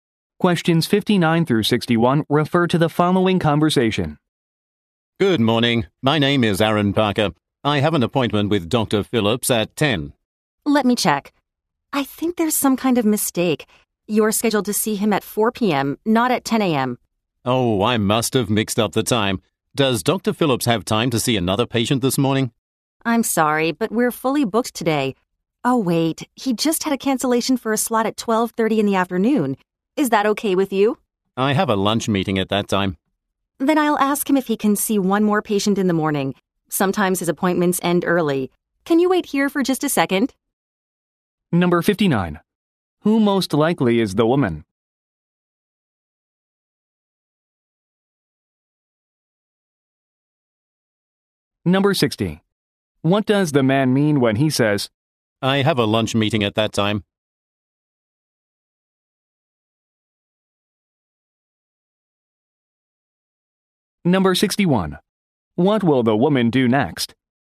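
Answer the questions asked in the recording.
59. A receptionist
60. He can't take the 12:30 slot
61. Ask the doctor if he can see another patient in the morning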